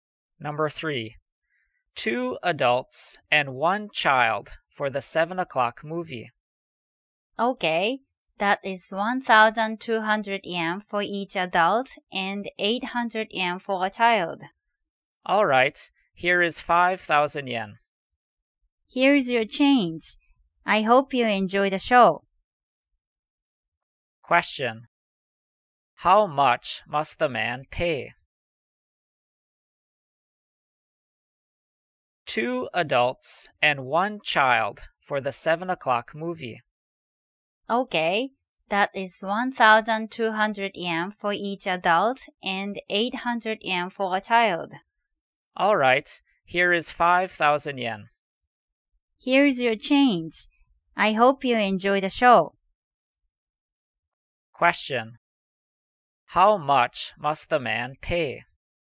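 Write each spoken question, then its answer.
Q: How much must the man pay?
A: 3,200 yen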